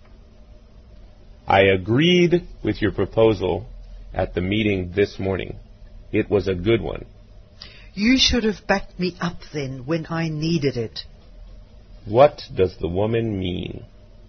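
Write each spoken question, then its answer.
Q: What does the woman mean?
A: He should have supported her at the meeting.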